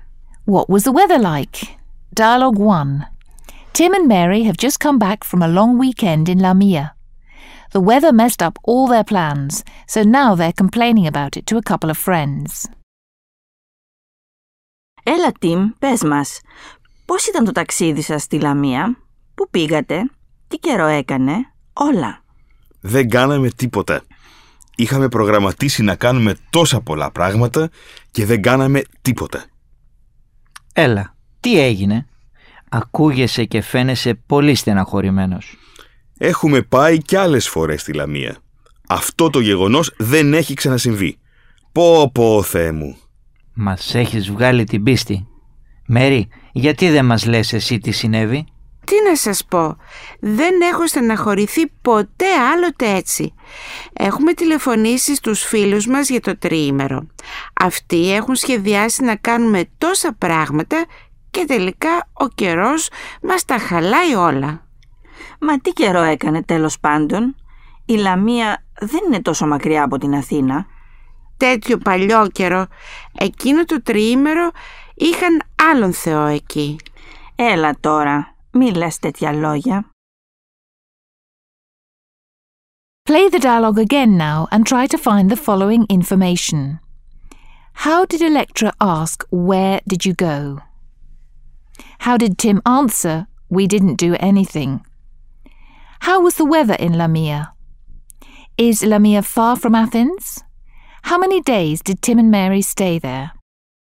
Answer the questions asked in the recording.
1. Πού πήγατε?
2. Δεν κάναμε τίποτα.
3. The weather was awful in Lamia
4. but Lamia is not too far from Athens.
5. Tim and Mary stayed for 3 days in Lamia.